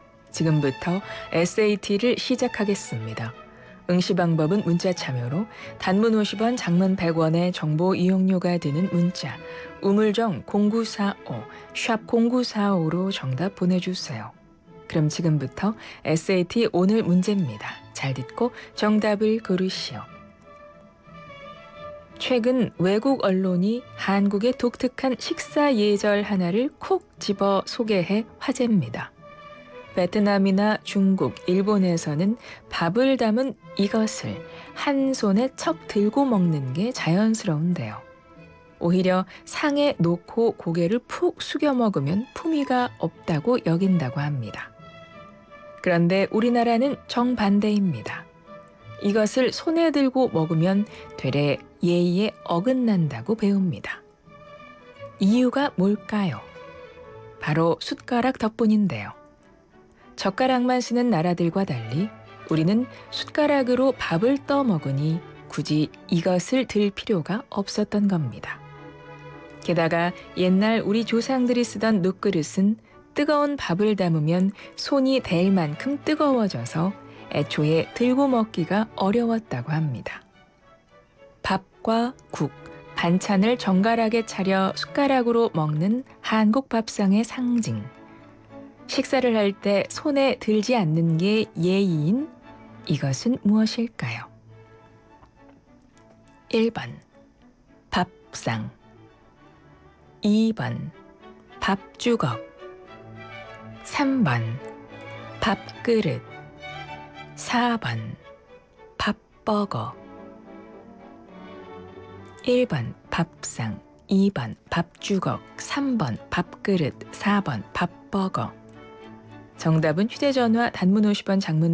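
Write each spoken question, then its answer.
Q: 식사를 할 때 손에 들지 않는 게 예의인 이것은 무엇일까요?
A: 3번: 밥그릇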